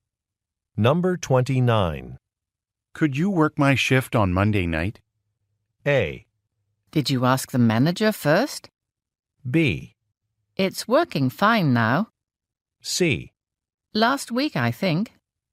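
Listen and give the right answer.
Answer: A: Did you ask the manager first?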